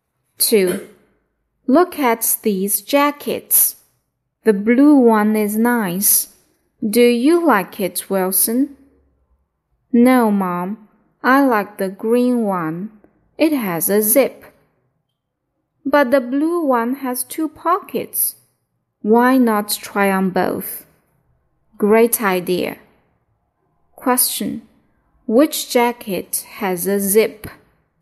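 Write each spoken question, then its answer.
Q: Which jacket has a zip?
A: The green one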